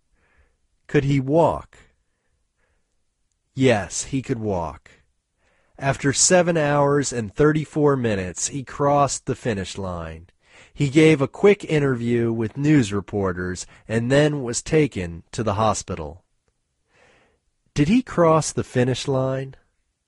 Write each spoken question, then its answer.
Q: Did he cross the finish line?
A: Yes, he crossed the finish line.